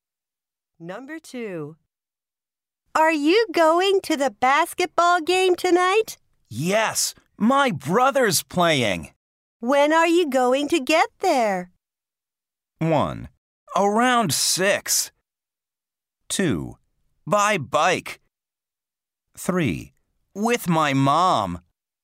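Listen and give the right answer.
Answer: 1: Around 6.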